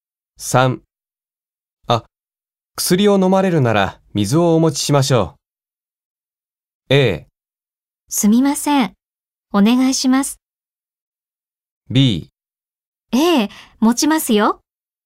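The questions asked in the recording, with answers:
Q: あ、薬を飲まれるなら水をお持ちしましょう。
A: A: すみません。お願いします。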